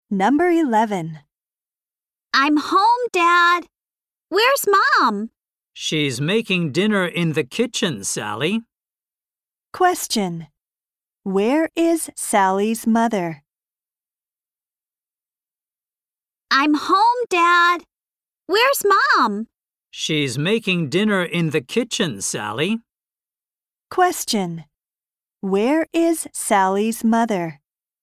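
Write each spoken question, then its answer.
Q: Where is Sally's mother?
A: In the kitchen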